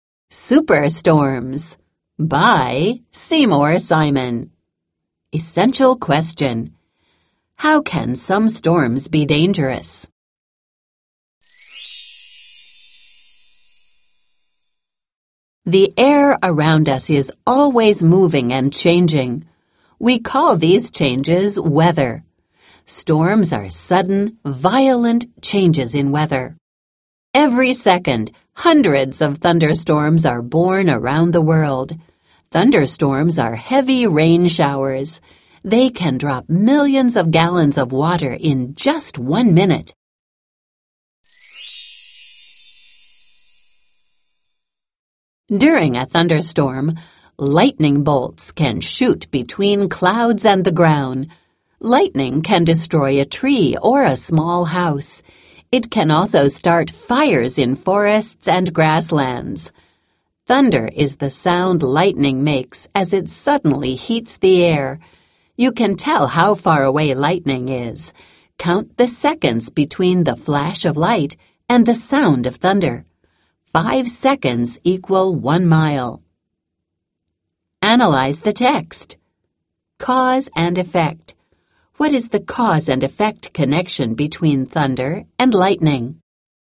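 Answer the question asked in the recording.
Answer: Lightning suddenly heats the air, causing the sound of thunder.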